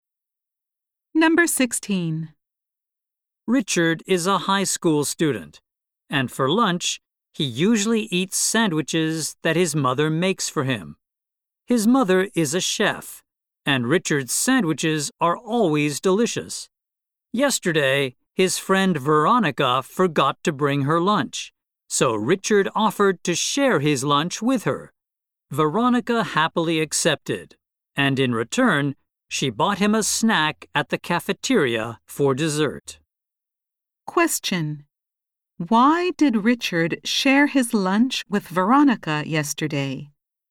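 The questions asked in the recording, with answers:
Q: Why did Richard share his lunch with Veronica yesterday?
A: Because Veronica forgot to bring her lunch.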